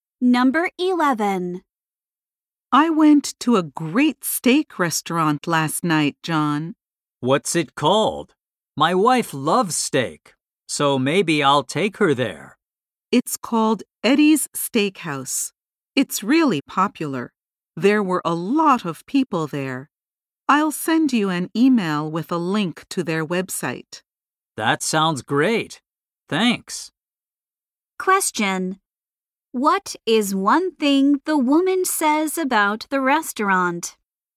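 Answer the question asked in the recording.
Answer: It is really popular.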